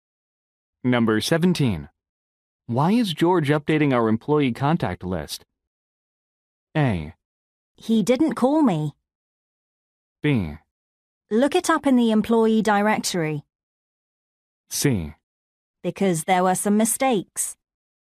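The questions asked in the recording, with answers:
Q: Why is George updating our employee contact list?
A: C: Because there were some mistakes.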